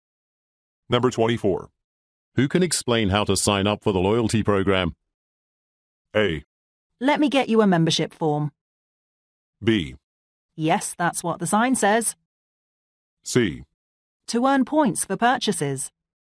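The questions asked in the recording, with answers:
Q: Who can explain how to sign up for the loyalty program?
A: A: Let me get you a membership form.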